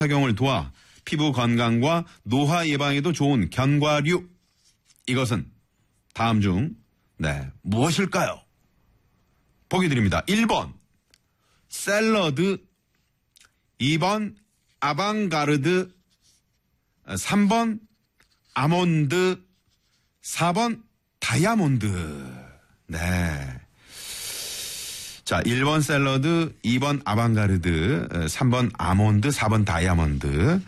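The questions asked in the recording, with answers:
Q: 이것은 다음 중 네, 무엇일까요?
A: 3: 아몬드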